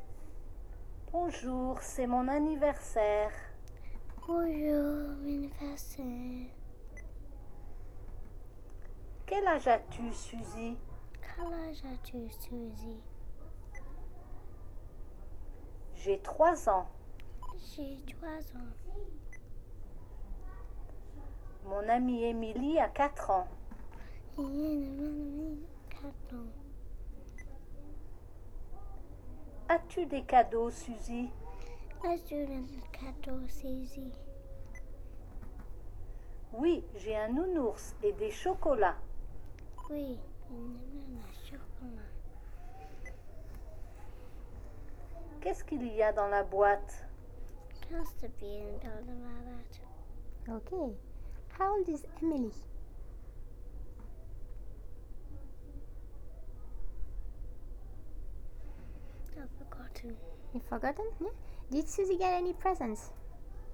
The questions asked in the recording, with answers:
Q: Did Susie get any presents?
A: Yes?